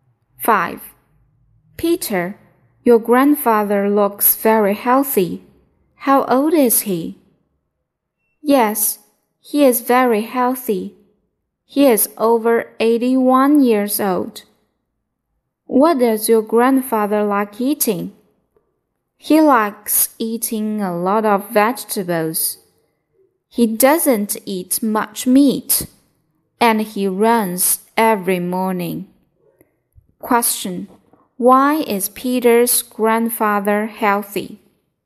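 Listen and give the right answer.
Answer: He eats a lot of vegetables, not much meat, and runs every morning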